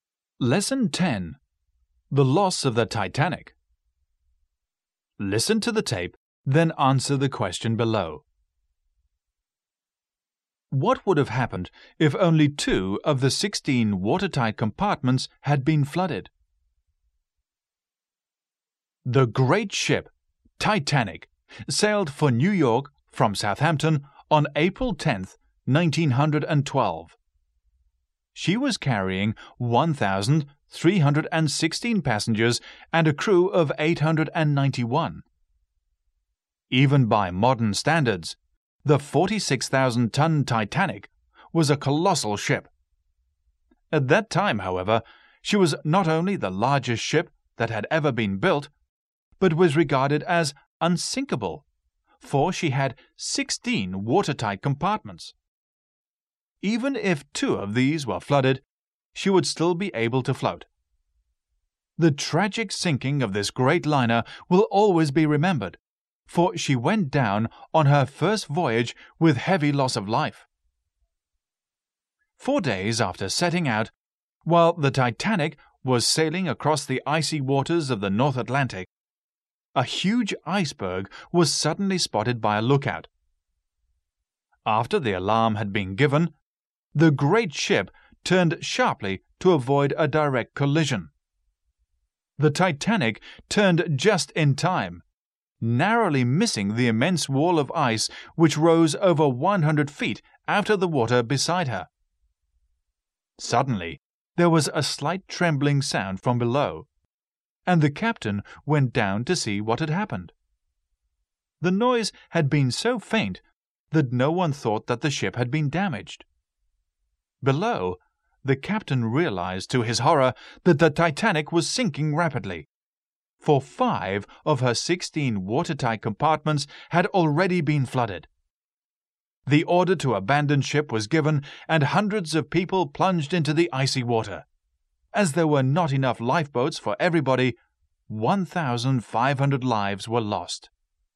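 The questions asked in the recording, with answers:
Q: What would have happened if only 2 of the 16 watertight compartments had been flooded?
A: She would still have been able to float.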